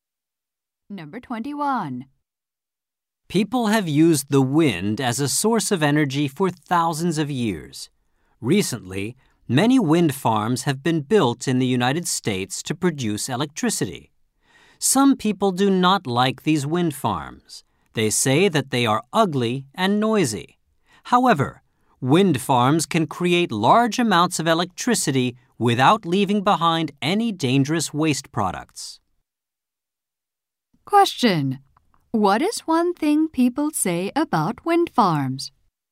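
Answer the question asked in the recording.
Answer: They are ugly and noisy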